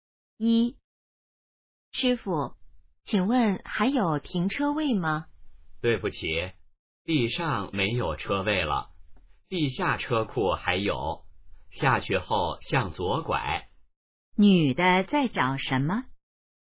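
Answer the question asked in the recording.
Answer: 停车位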